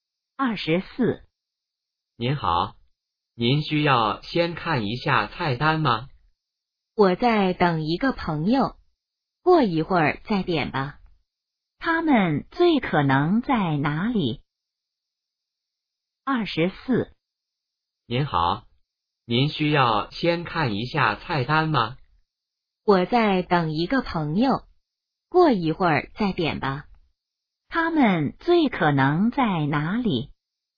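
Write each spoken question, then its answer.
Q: 他们最可能在哪里?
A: 饭馆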